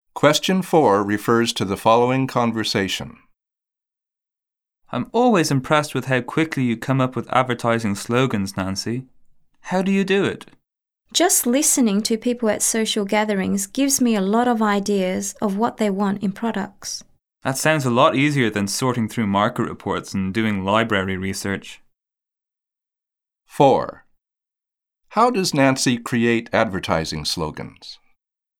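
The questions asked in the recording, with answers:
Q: How does Nancy create advertising slogans?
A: By listening to people at social gatherings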